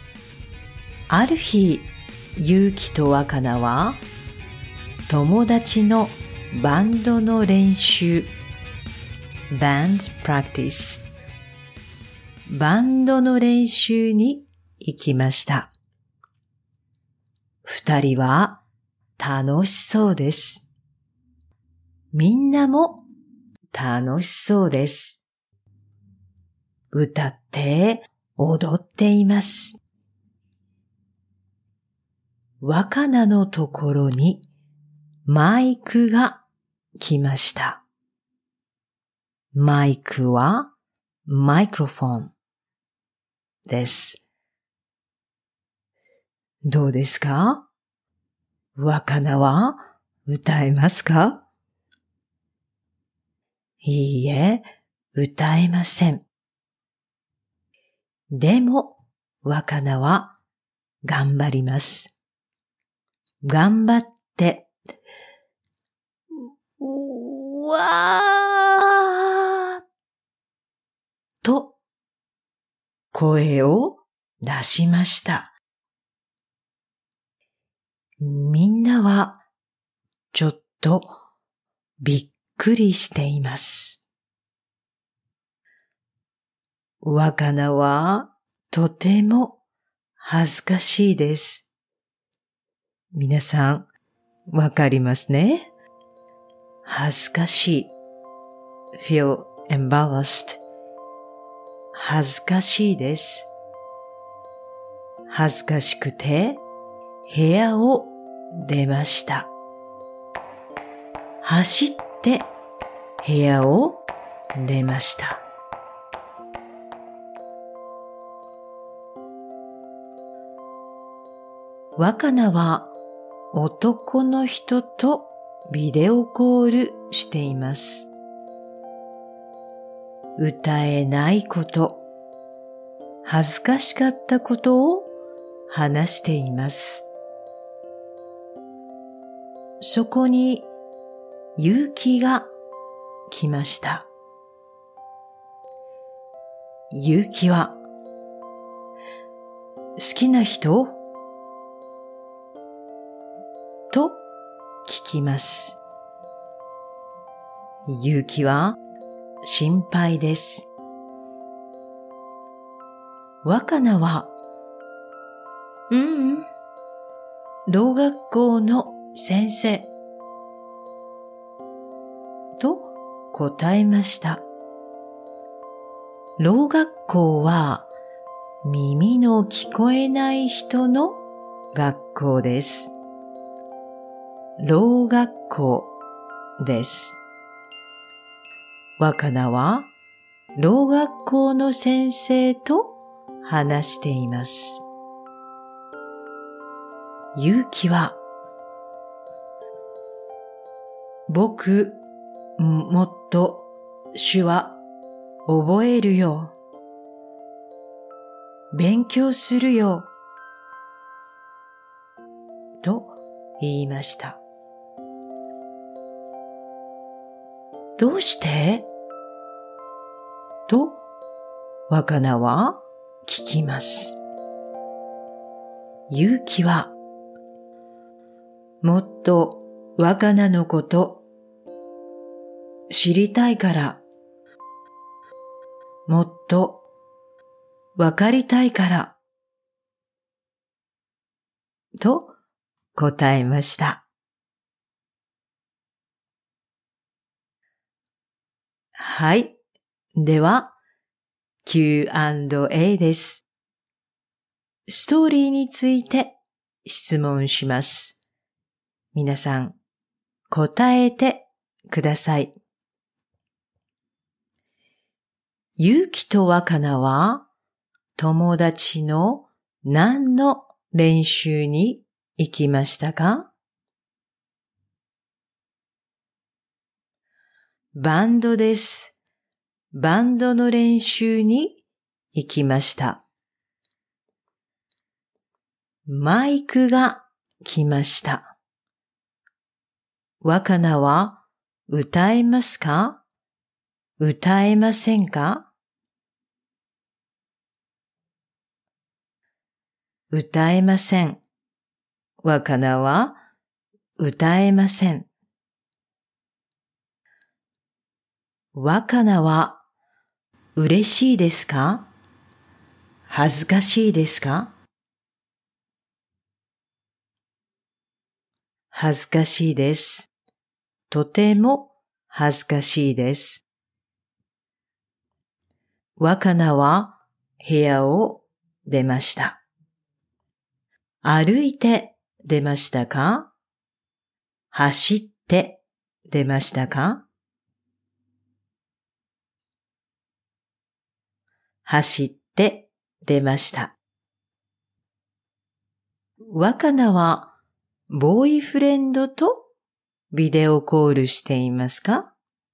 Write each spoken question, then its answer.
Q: ゆうきとわかなは、友達の何の練習に行きましたか?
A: バンドです。バンドの練習に行きました。

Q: マイクが来ました。若菜は歌えますか?歌えませんか?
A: 歌えません。若菜は歌えません。

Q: 若菜は嬉しいですか?恥ずかしいですか?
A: 恥ずかしいです。とても恥ずかしいです。

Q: 若菜は部屋を出ました。歩いて出ましたか?走って出ましたか?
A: 走って出ました。

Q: 若菜はボーイフレンドとビデオコールしていますか?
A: いいえ、ボーイフレンドじゃありません。老学校の先生です。